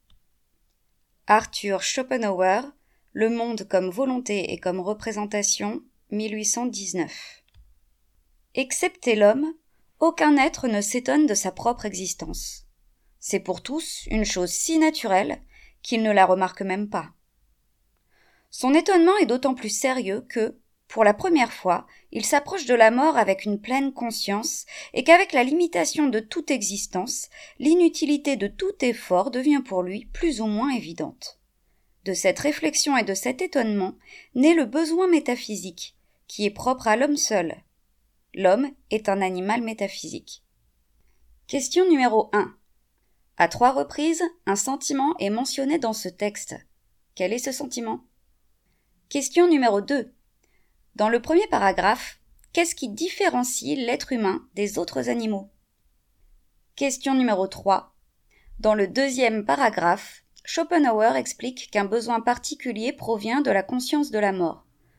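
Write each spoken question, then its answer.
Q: À trois reprises, un sentiment est mentionné dans ce texte. Quel est ce sentiment ?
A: L'étonnement

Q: Dans le premier paragraphe, qu'est-ce qui différencie l'être humain des autres animaux ?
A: Il est le seul être à s'étonner de sa propre existence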